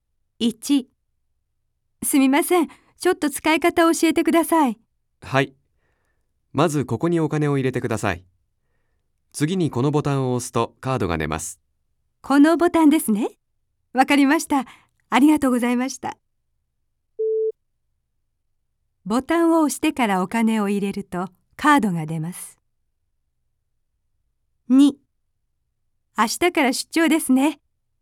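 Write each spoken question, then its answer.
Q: ボタンを押してからお金を入れるとカードが出ます。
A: ×(お金を入れてからボタンを押す)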